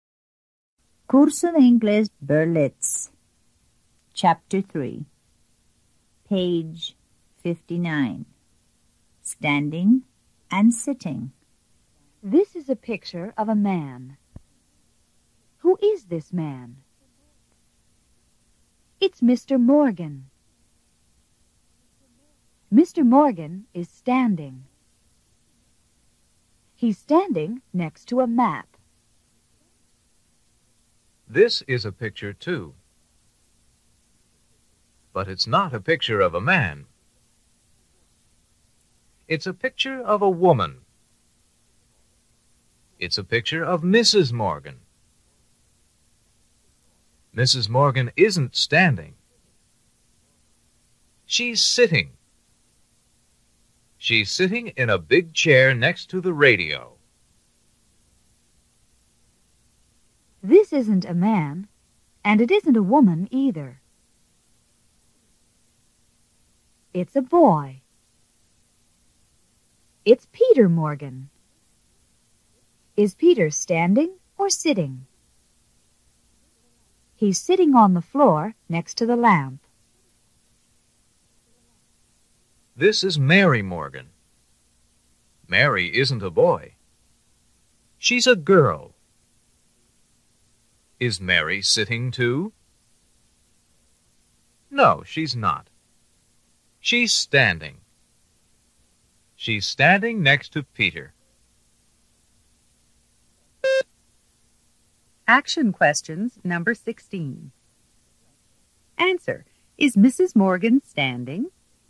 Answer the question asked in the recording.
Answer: No, she's not.